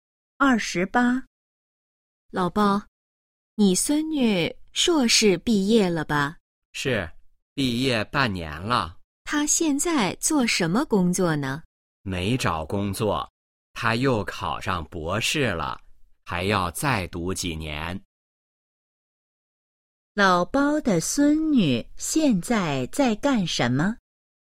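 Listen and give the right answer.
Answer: 读博士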